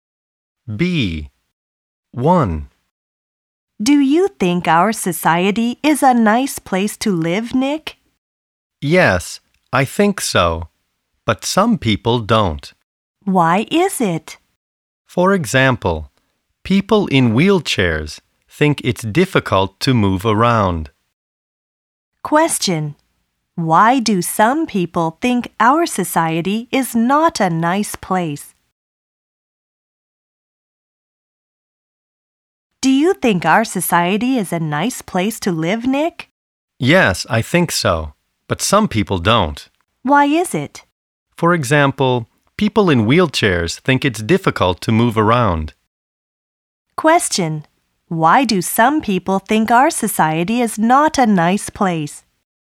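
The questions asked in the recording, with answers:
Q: Why do some people think our society is not a nice place?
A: Because people in wheelchairs find it difficult to move around.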